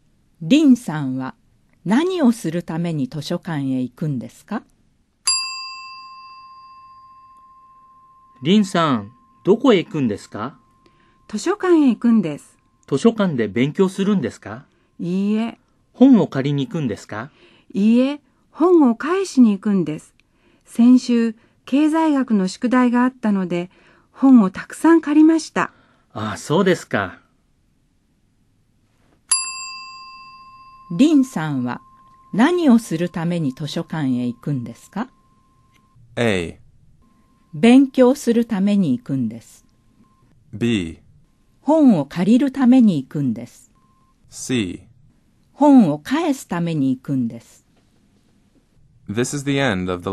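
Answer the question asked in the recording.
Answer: C: 本を返すために行くんです。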